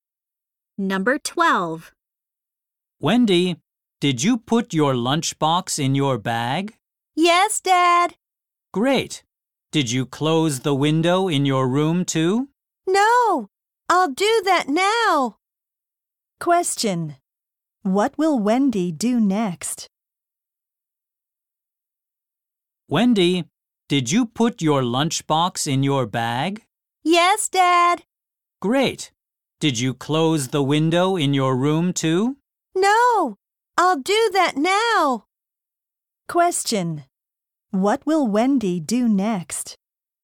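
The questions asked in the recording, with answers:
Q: What will Wendy do next?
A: Close the window in her room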